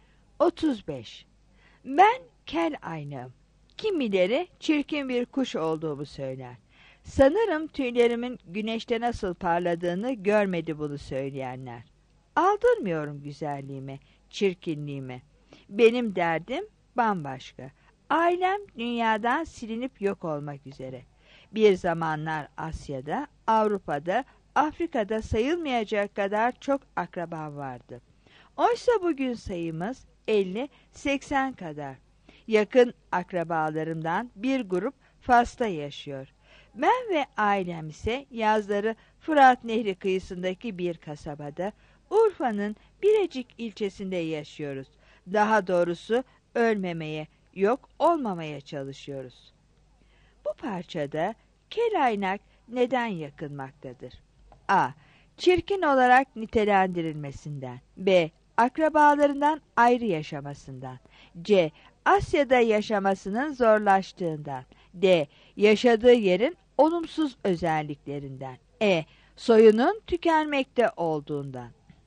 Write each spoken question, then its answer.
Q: Bu parçada kelaynak neden yakınmaktadır?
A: 35 E